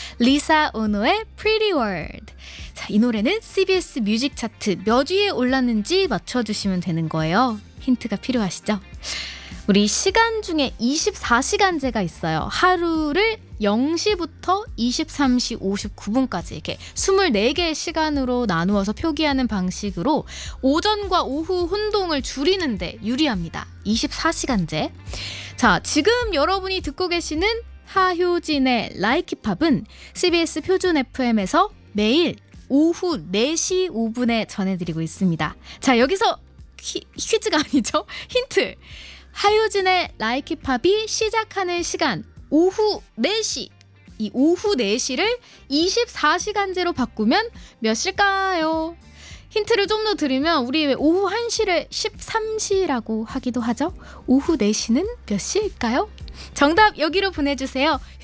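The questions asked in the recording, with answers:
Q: 오후 4시는 몇 시일까요?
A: 16시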